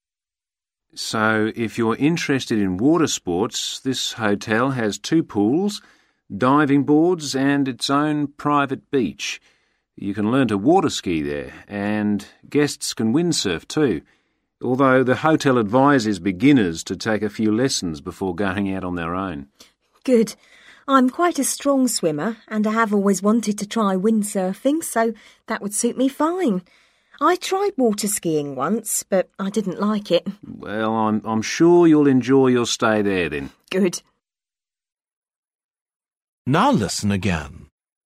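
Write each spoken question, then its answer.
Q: Which sport will the woman learn on holiday?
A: windsurfing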